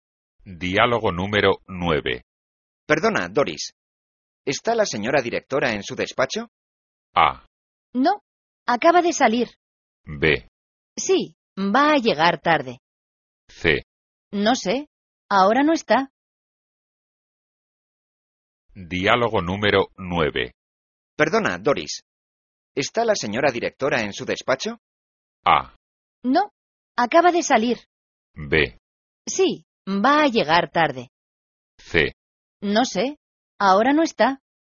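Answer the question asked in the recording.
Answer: A: No, acaba de salir.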